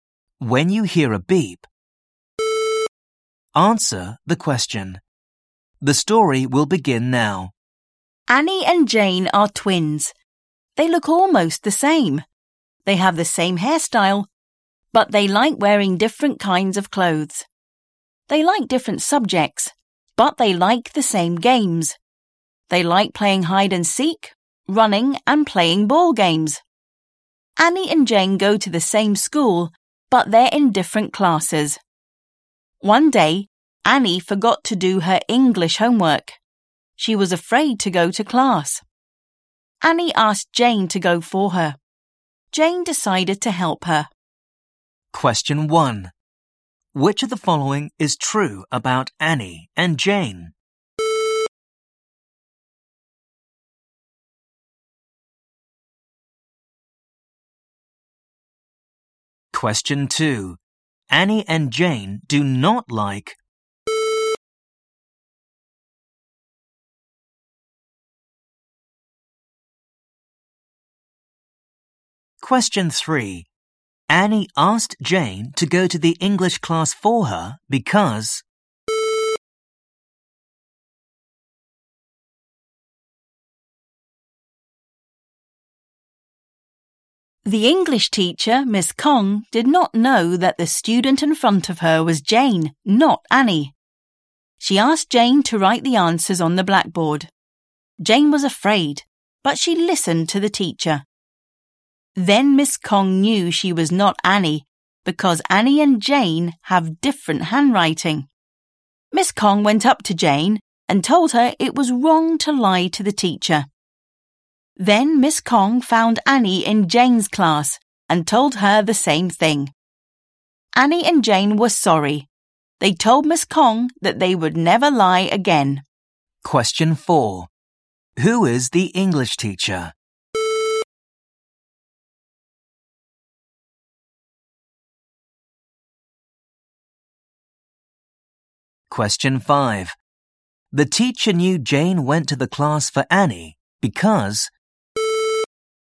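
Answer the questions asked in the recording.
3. Annie forgot to do her English homework and was afraid to go to class
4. Miss Kong
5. Annie and Jane have different handwriting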